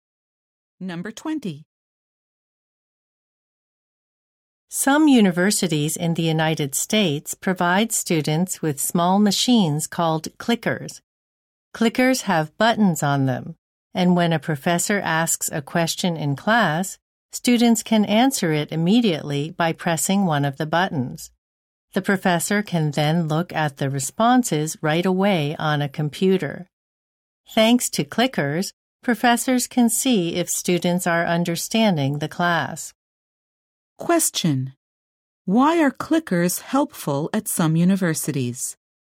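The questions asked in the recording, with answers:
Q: Why are clickers helpful at some universities?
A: Professors can see if students understand the class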